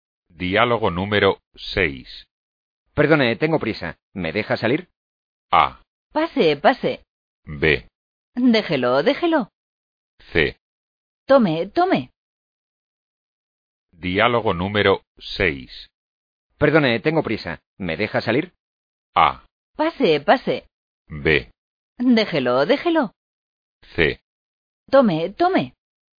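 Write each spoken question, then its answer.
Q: Perdone, tengo prisa. ¿Me deja salir?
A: A: Pase, pase.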